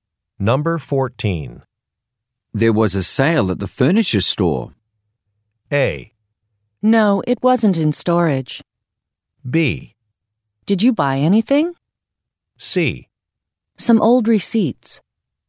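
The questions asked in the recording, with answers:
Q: There was a sale at the furniture store.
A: B: Did you buy anything?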